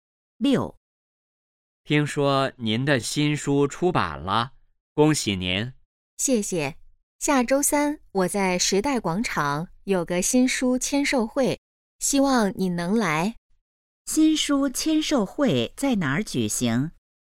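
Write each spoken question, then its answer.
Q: 新书签售会在哪儿举行?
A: 时代广场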